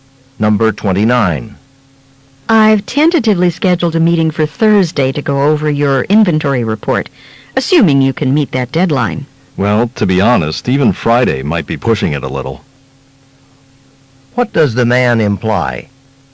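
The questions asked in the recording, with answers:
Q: What does the man imply?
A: He won't finish the report by Thursday.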